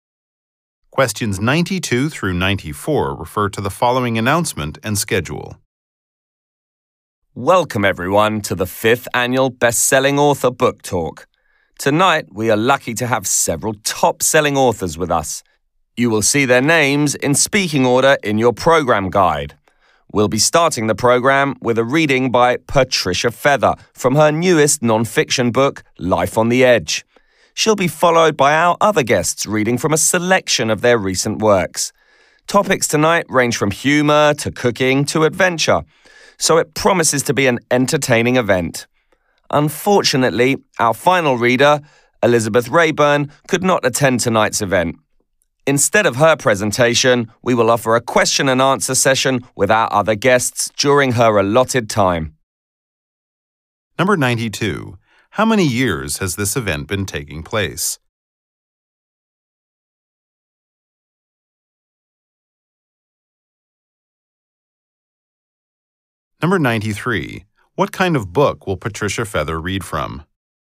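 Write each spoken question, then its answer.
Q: How many years has this event been taking place?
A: 5 years

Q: What kind of book will Patricia Feather read from?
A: A non-fiction book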